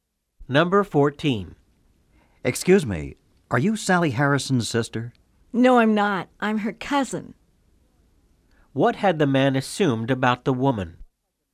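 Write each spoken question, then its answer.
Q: What had the man assumed about the woman?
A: That she was Sally Harrison's sister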